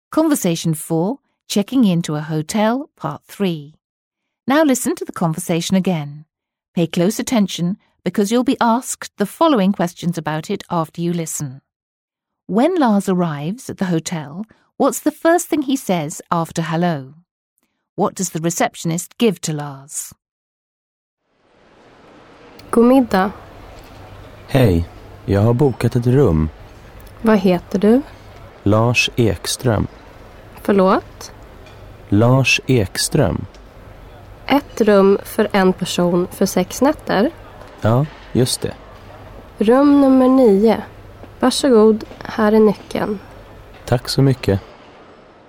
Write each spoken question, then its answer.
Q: When Lars arrives at the hotel, what's the first thing he says after hello?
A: He says, I have booked a room.

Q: What does the receptionist give to Lars?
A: If you said the key, you're right again.